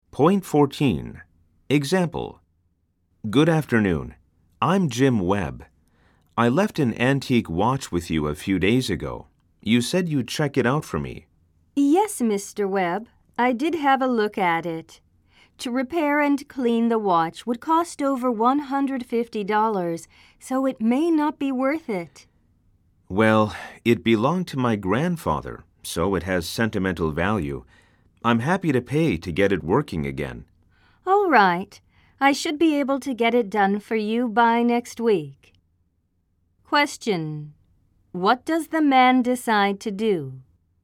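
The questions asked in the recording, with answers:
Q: What does the man decide to do?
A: Pay to have his grandfather's antique watch repaired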